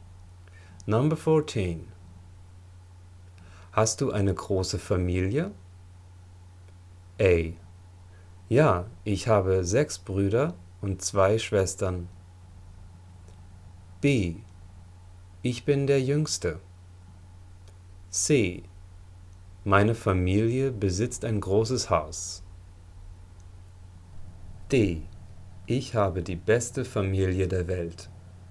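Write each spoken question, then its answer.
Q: Hast du eine große Familie?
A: A: Ja, ich habe 6 Brüder und 2 Schwestern.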